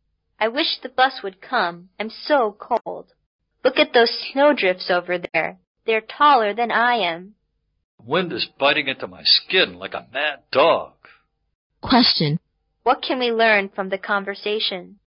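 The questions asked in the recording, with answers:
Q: What can we learn from the conversation?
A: It is very cold and snowy while they wait for the bus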